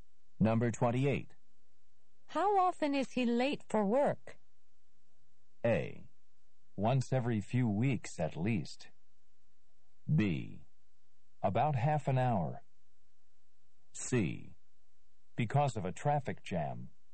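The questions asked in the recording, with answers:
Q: How often is he late for work?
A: A: Once every few weeks at least.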